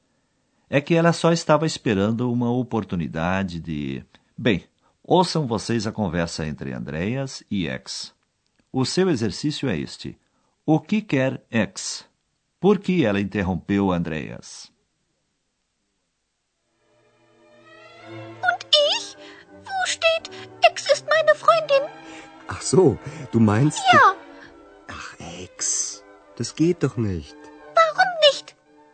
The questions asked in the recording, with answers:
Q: O que quer X?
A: Ex acha que Andreas deveria escrever sobre ela.